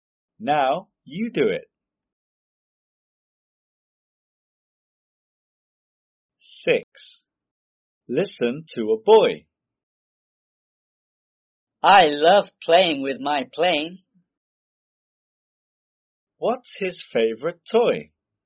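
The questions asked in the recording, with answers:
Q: What's his favorite toy?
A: his plane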